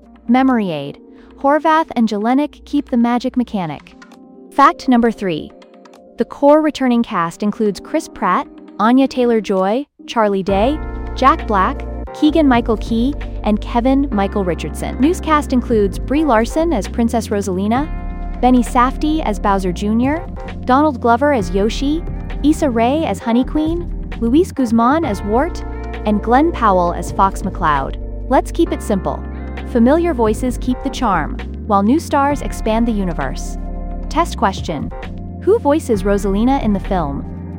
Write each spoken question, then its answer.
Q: Who voices Rosalina in the film?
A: Correct answer, Brie Larson.